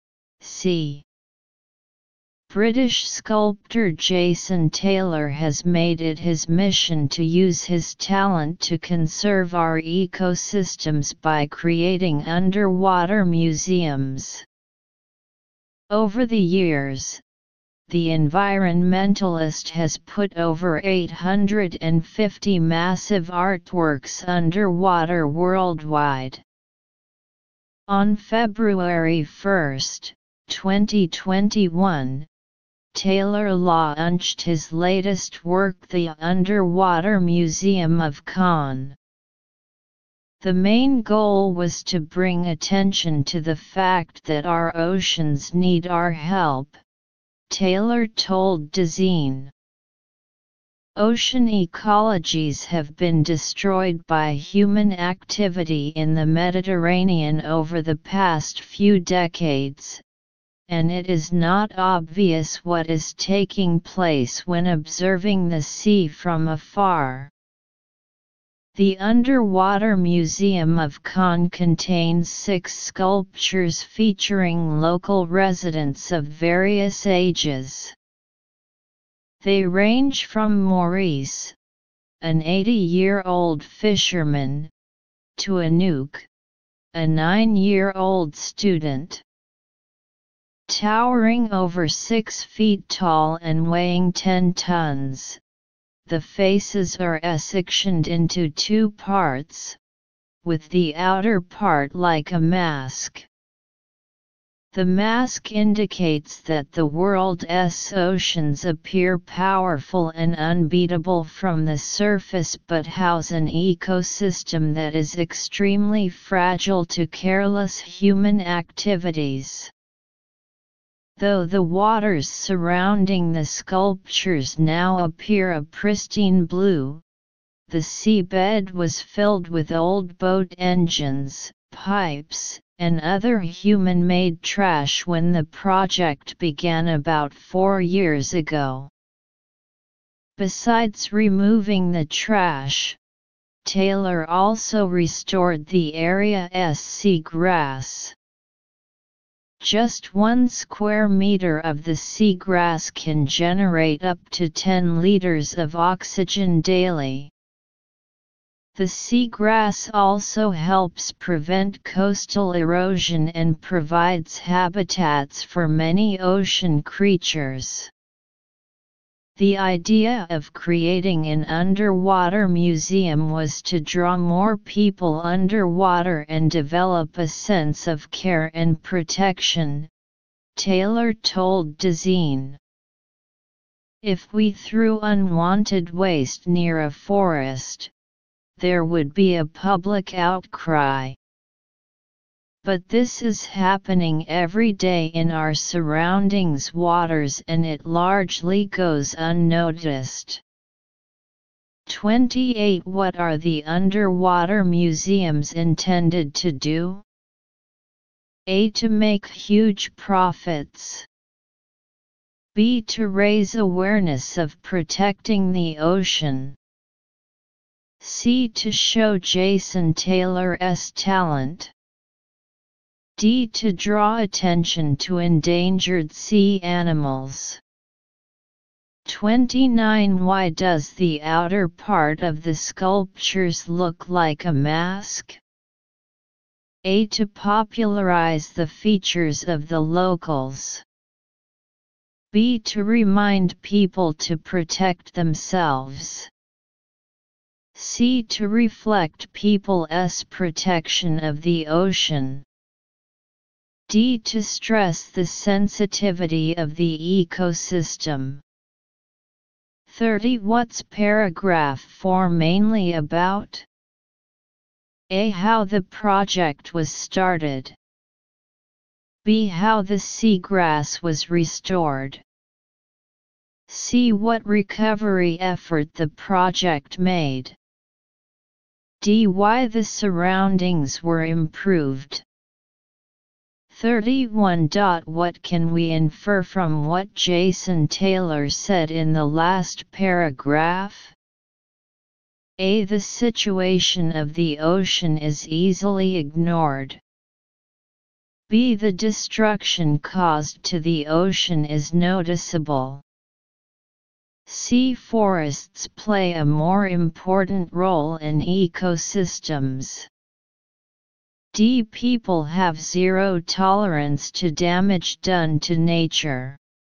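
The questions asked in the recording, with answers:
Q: What are the underwater museums intended to do?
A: B: To raise awareness of protecting the ocean.

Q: Why does the outer part of the sculptures look like a mask?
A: D: To stress the sensitivity of the ecosystem.

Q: What's paragraph 4 mainly about?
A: C: What recovery effort the project made.

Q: What can we infer from what Jason Taylor said in the last paragraph?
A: A: The situation of the ocean is easily ignored.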